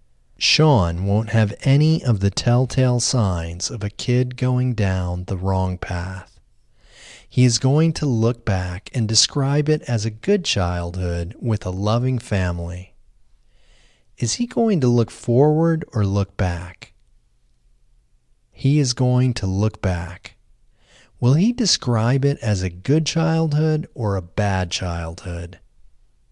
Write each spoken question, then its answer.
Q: Is he going to look forward or look back?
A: He is going to look back.

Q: Will he describe it as a good childhood or a bad childhood?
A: He will describe it as a good childhood.